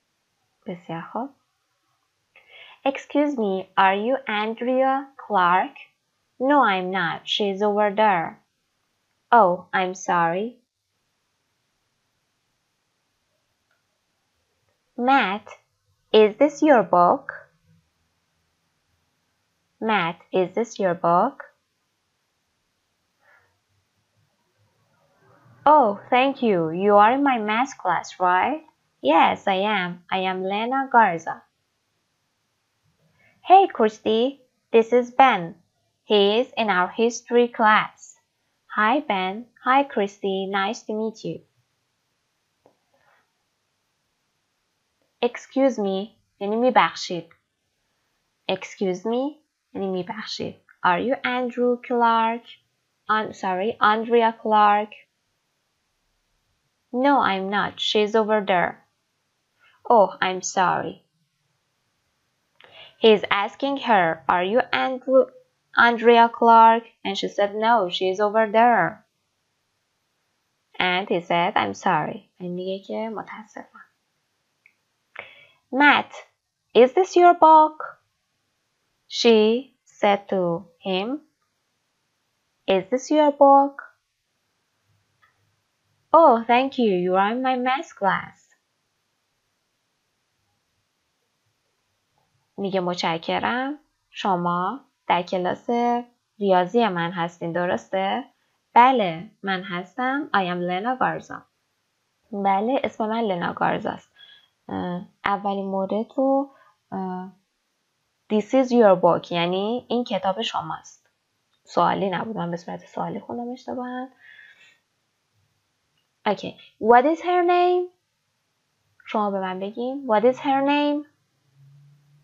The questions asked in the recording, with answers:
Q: What is her name?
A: Yes, her name is Lena Garza.